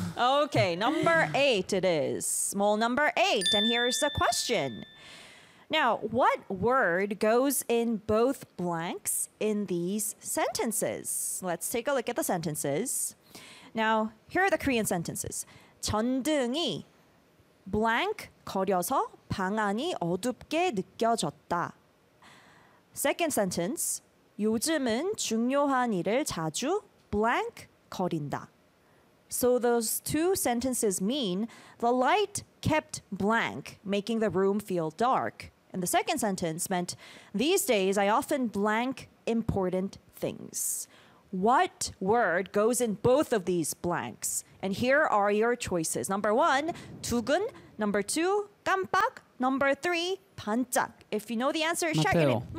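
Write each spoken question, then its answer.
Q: What word goes in both of these blanks?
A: 2: 깜빡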